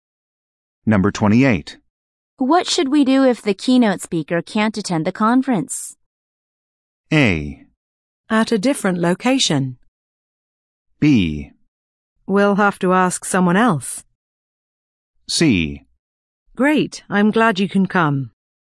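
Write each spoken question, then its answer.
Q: What should we do if the keynote speaker can't attend the conference?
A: B: We'll have to ask someone else.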